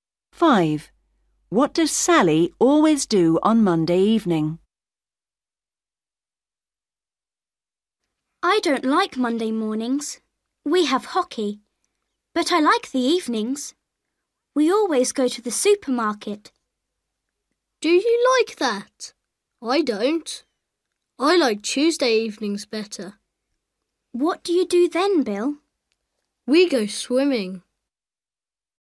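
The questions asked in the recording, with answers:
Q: What does Sally always do on Monday evening?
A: goes to the supermarket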